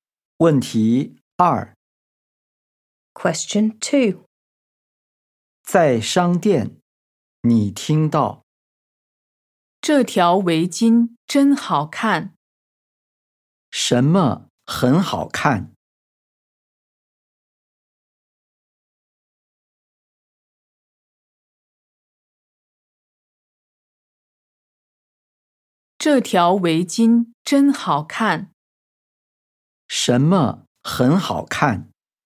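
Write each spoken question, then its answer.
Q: 什么很好看?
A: 围巾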